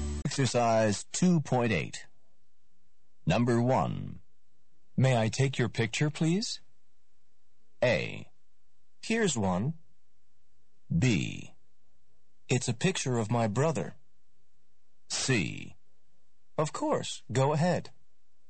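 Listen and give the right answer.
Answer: C: Of course, go ahead.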